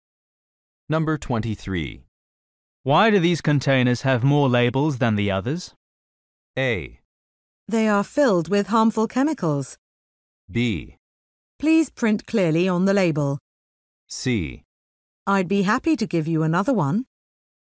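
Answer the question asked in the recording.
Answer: A: They are filled with harmful chemicals.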